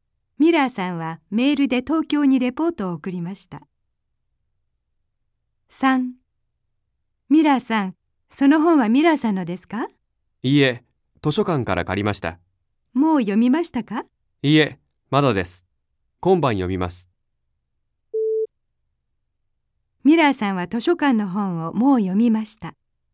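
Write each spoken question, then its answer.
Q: ミラーさんは図書館の本をもう読みました。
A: ×(まだです、今晩読みます)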